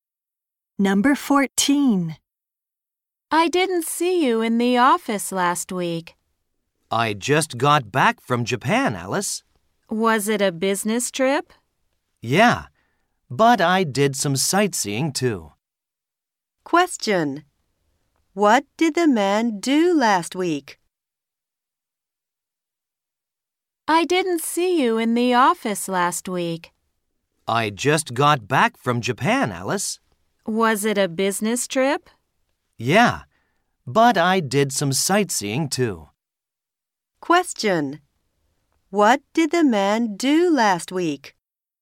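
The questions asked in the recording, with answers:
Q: What did the man do last week?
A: He went on a business trip to Japan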